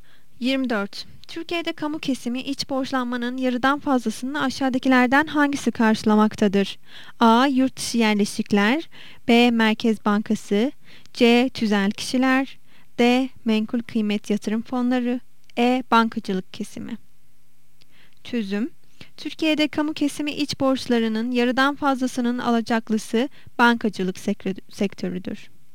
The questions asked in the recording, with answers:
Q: Türkiye'de kamu kesimi iç borçlanmanın yarıdan fazlasını aşağıdakilerden hangisi karşılamaktadır?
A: Yanıt E. Bankacılık kesimi.